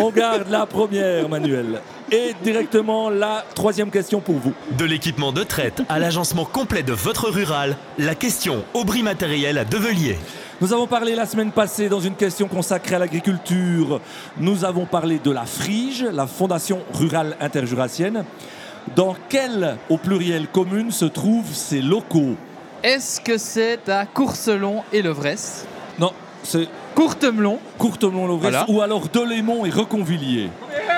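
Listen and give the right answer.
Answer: Courtemelon et Lovresse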